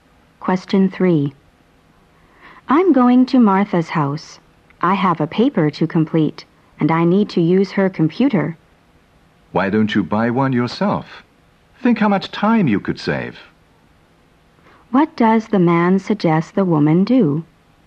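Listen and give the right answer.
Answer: Buy her own computer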